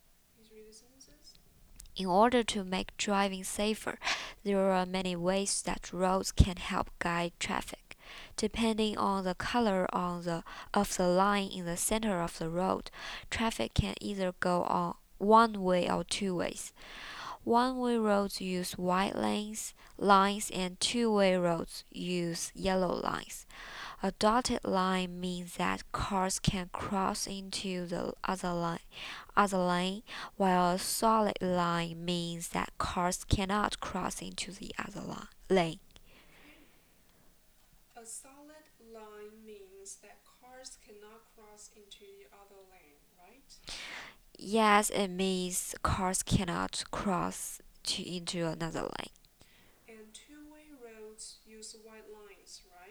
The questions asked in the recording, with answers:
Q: And two-way roads use white lines, right?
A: No, they use yellow lines.